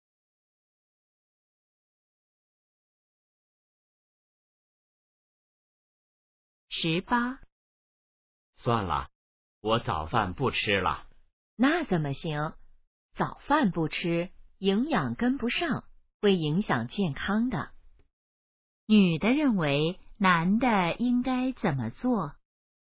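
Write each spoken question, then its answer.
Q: 女的认为男的应该怎么做?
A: 吃早饭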